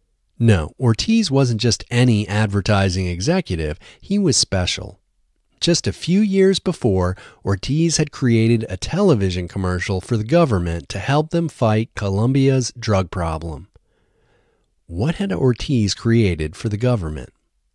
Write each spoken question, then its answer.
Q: What had Ortiz created for the government?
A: Ortiz had created a television commercial for the government.